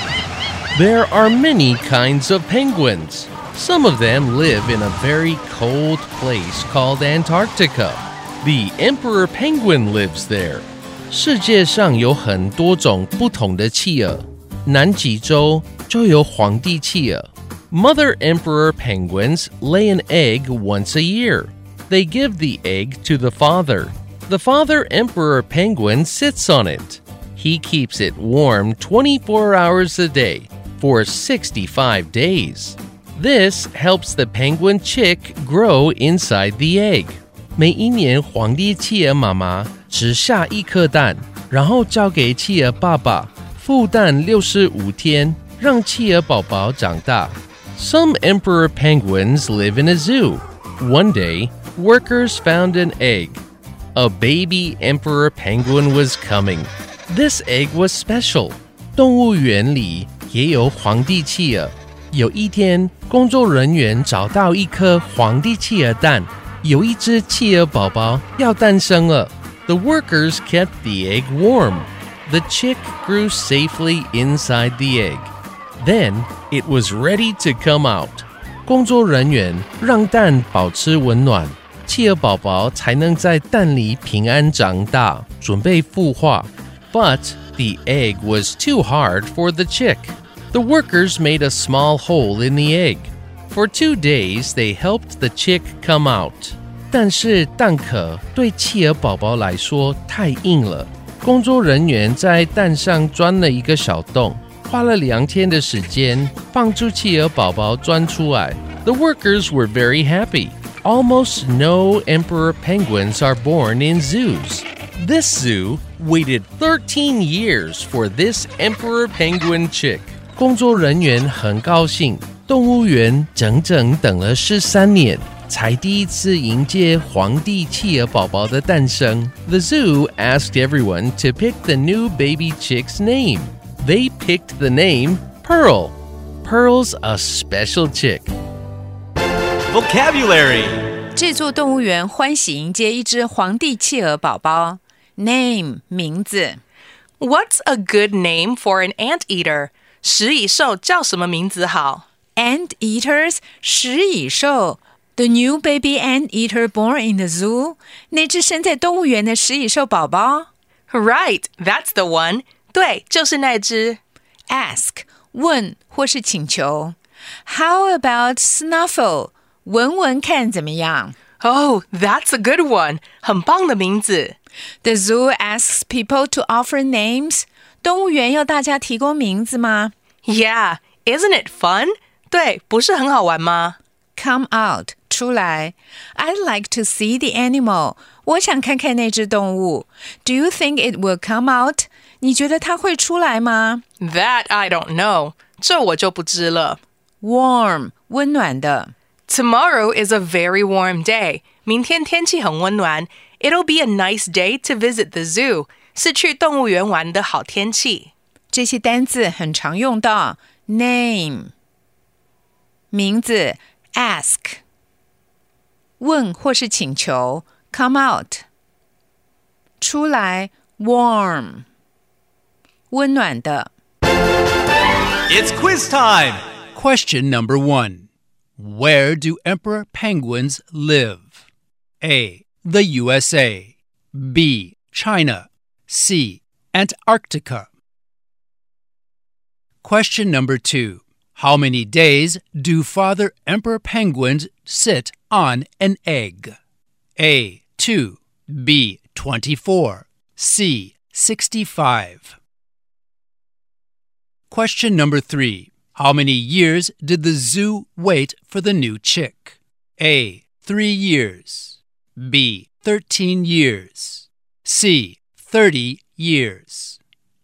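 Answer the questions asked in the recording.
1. C: Antarctica
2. C: 65
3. B: 13 years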